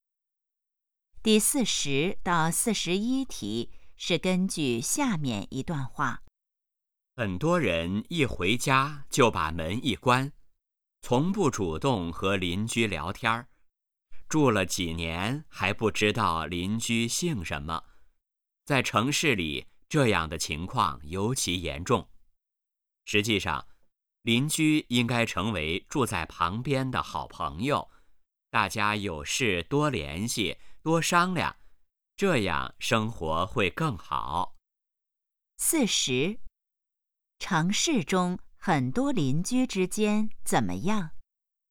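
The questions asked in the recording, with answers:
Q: 城市中很多邻居之间怎么样?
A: 互相不了解,很少联系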